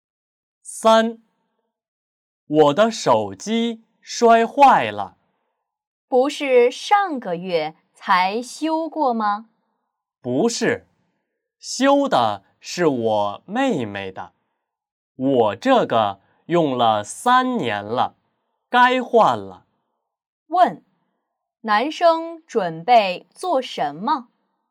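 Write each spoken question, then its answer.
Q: 问,男生准备做什么?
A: 换新手机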